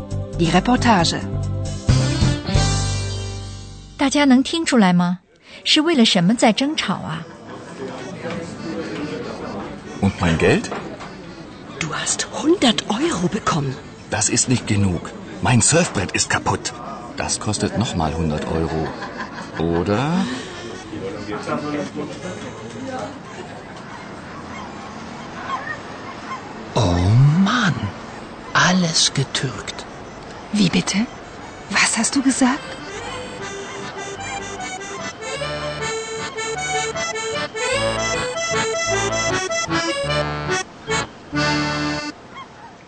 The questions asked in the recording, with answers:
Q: 大家能听出来吗?是为了什么在争吵啊?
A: 争吵的起因就是钱。